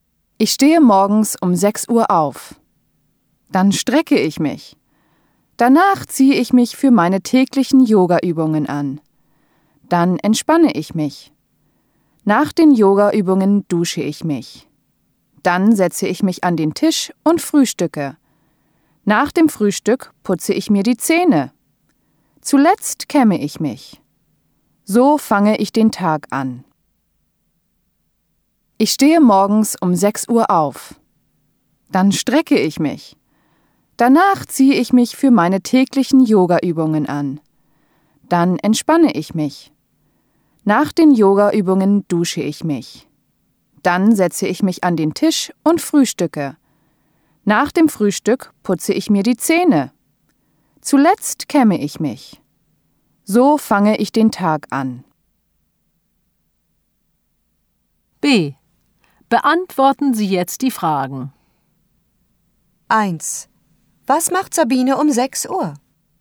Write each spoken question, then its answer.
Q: Was macht Sabine um 6 Uhr?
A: 6 Uhr morgens steht Sabine auf.